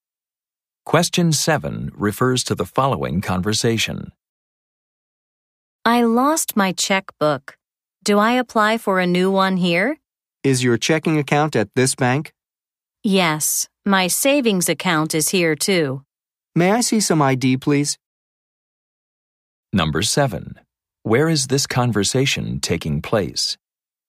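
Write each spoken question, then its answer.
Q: Where is this conversation taking place?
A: At a bank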